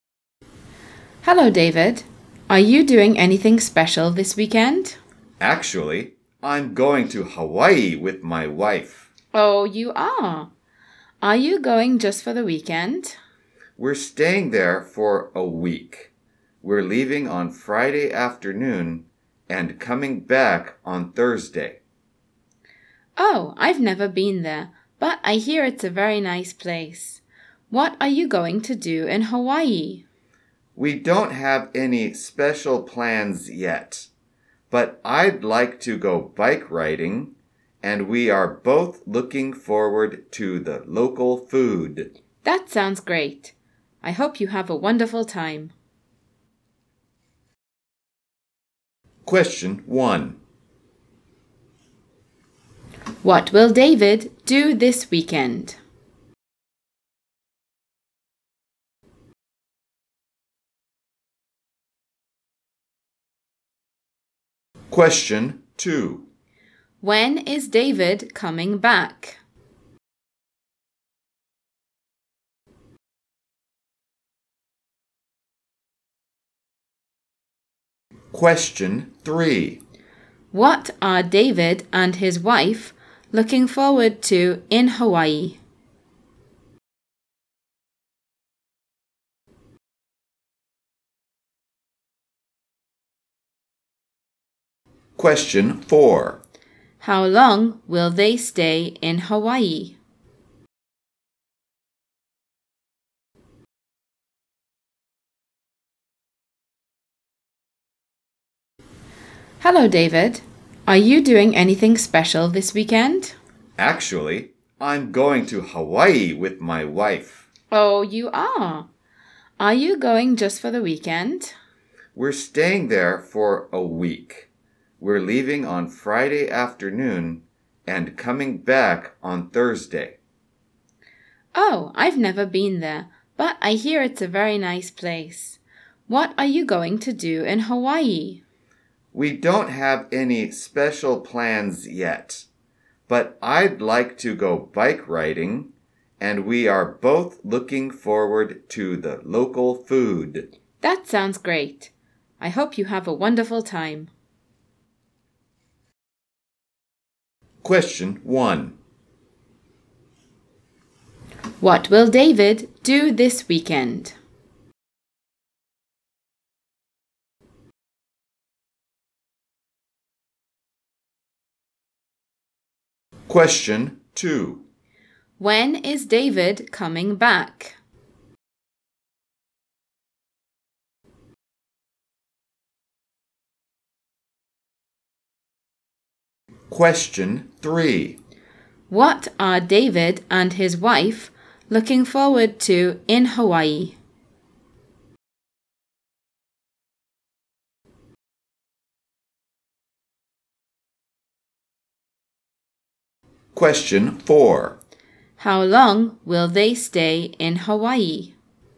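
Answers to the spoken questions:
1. Go to Hawaii with his wife
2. On Thursday
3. The local food
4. For a week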